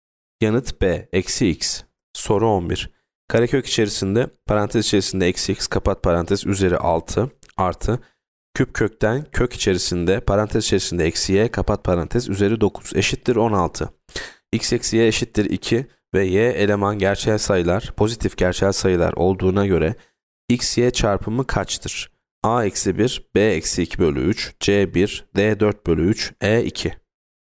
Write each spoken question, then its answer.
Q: X eksi y eşittir 2 ve y eleman gerçel sayılar pozitif gerçel sayılar olduğuna göre x y çarpımı kaçtır?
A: Yanıt D 4 bölü 3.